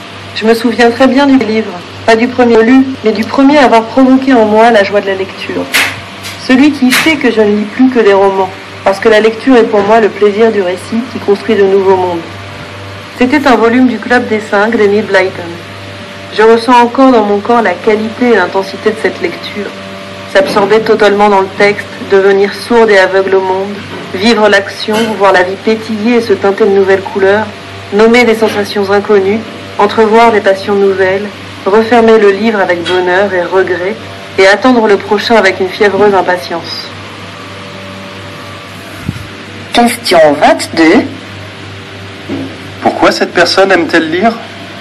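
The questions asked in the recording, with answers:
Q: Pourquoi cette personne aime-t-elle lire ?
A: Pour le plaisir du récit qui construit de nouveaux mondes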